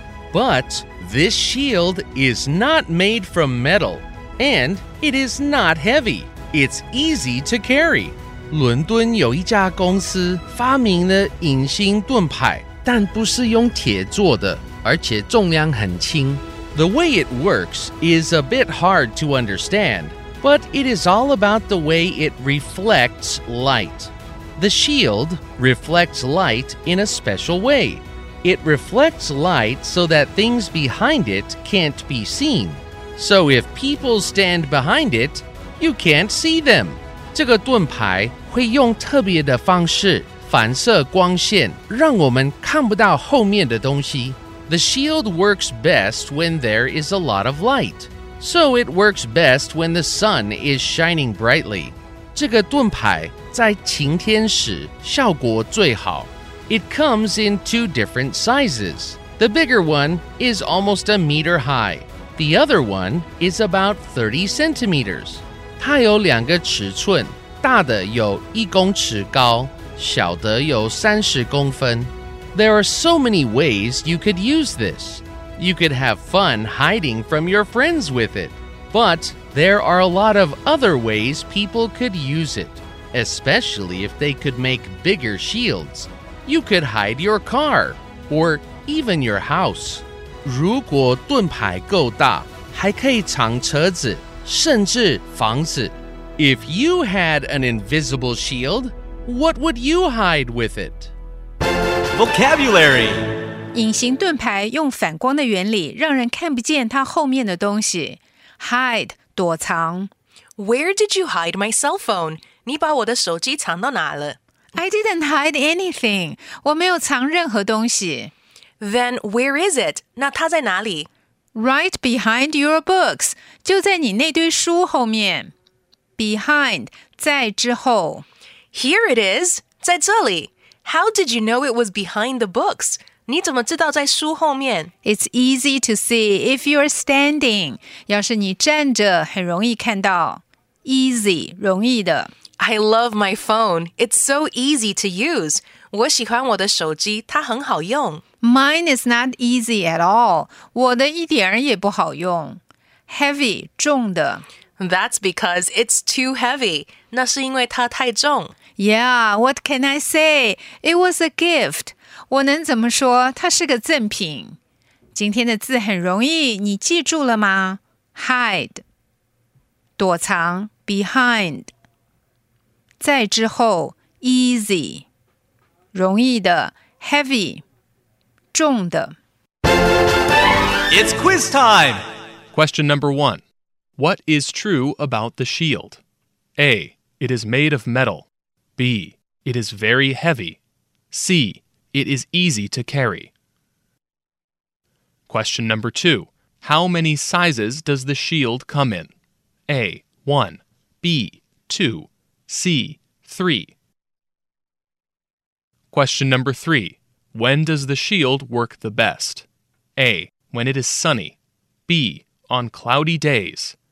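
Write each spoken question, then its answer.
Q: What is true about the shield?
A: C: It is easy to carry.

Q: How many sizes does the shield come in?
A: B: 2

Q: When does the shield work the best?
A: A: When it is sunny.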